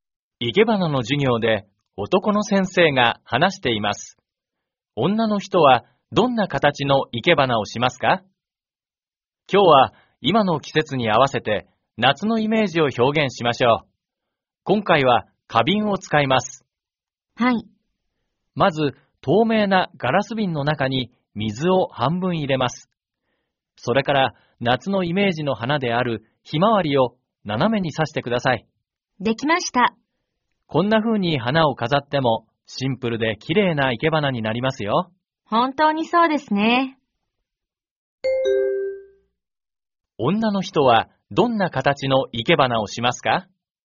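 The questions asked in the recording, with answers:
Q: 女の人はどんな形の生け花をしますか?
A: 水を半分入れた透明なガラス瓶にひまわりを斜めに挿す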